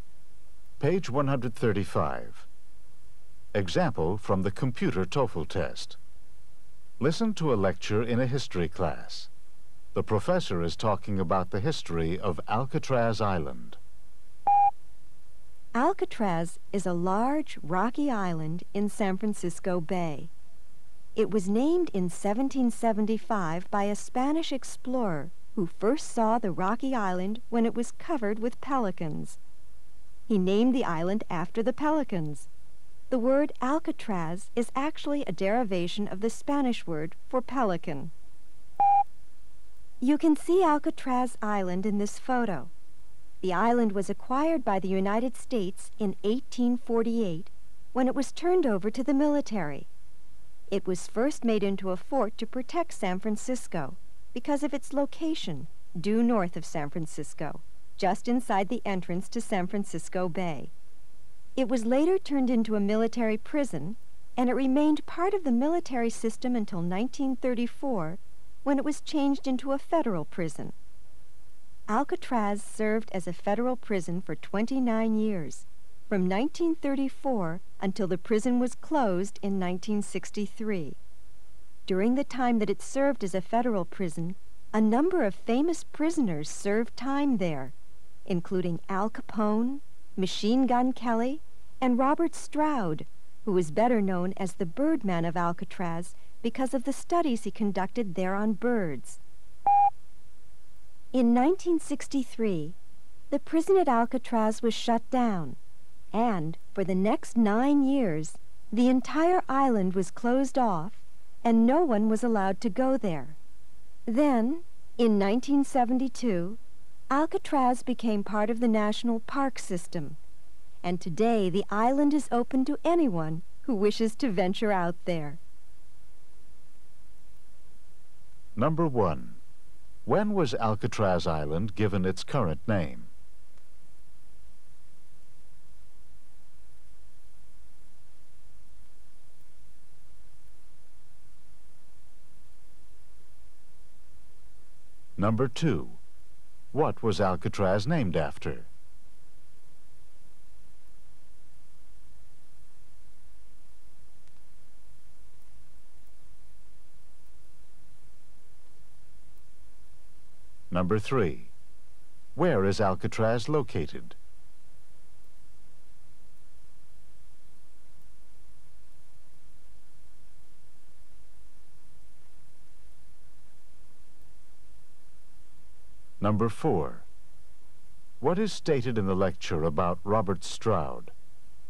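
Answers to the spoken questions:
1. In 1775
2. Pelicans
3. In San Francisco Bay, north of San Francisco
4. He was known as the Birdman of Alcatraz for studying birds there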